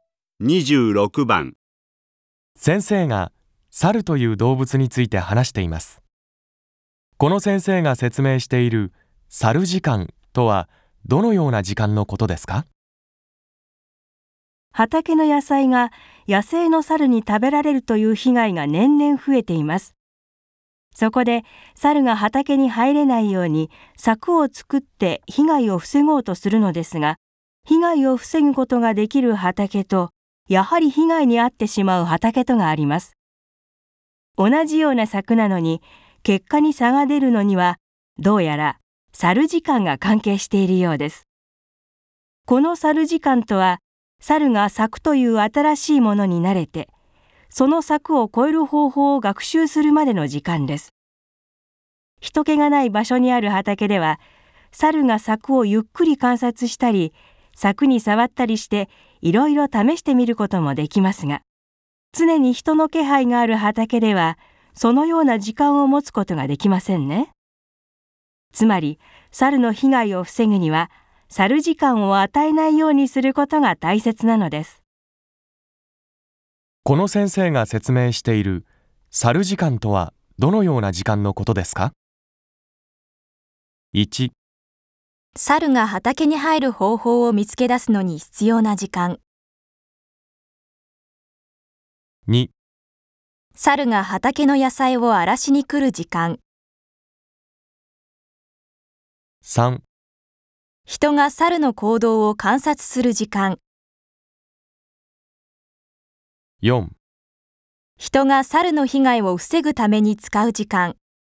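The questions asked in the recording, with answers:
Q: この先生が説明している猿時間とはどのような時間のことですか?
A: 1: 猿が畑に入る方法を見つけ出すのに必要な時間。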